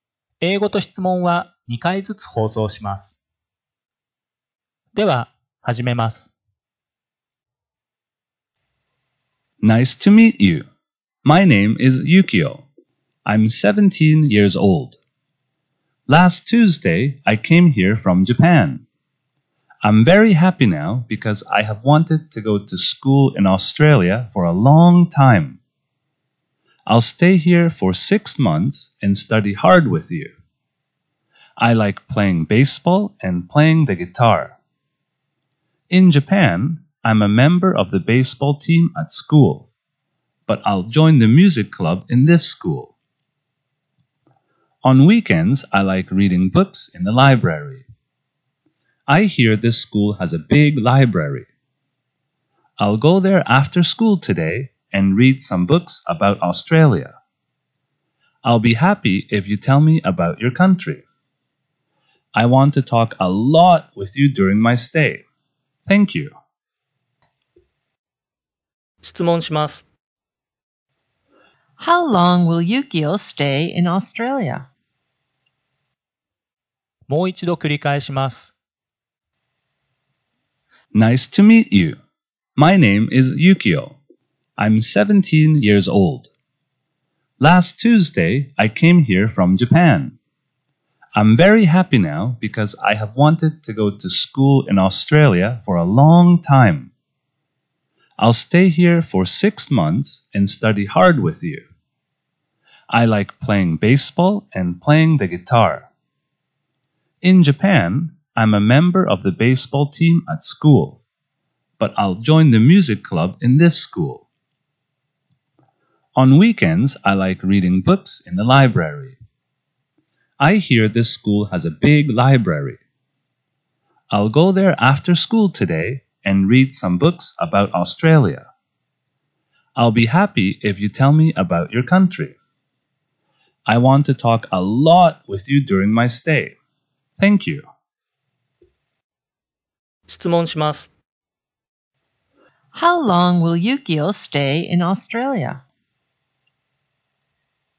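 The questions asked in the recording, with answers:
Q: How long will Yukio stay in Australia?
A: For six months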